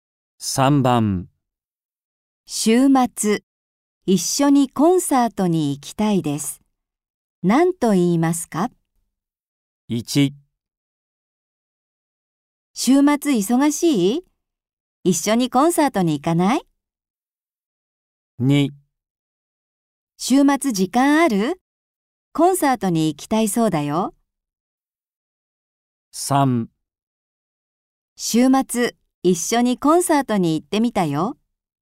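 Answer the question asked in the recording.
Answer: 1: 週末忙しい?一緒にコンサートに行かない?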